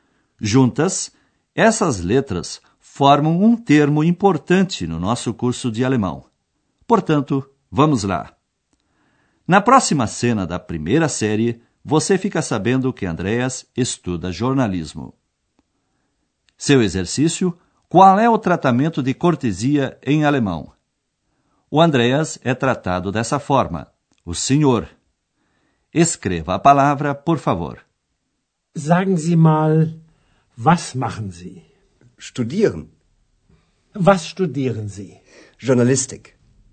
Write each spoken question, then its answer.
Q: qual é o tratamento de cortesia em alemão?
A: Essa palavra é zi, com letra S maiúscula.